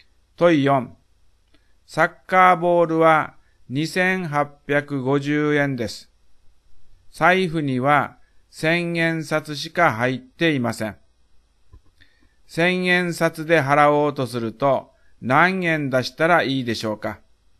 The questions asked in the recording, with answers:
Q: 1000円札で払おうとすると何円出したらいいでしょうか?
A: 3000円出してお釣りをもらいます。